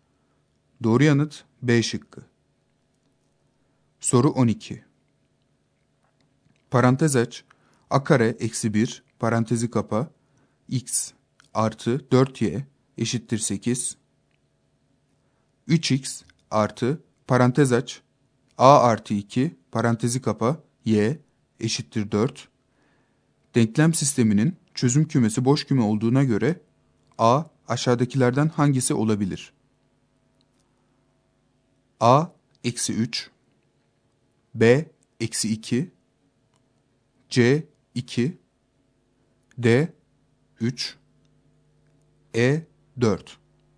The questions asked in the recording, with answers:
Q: Denklem sisteminin çözüm kümesi boş küme olduğuna göre A aşağıdakilerden hangisi olabilir?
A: Doğru yanıt C şıkkı.